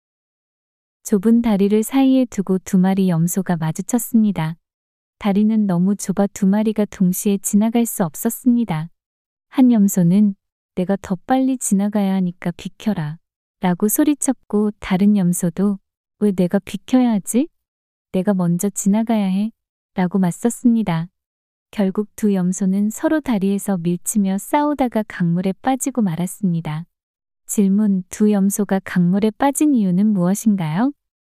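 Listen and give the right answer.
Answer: 서로 먼저 지나가려고 다리 위에서 밀치며 싸웠기 때문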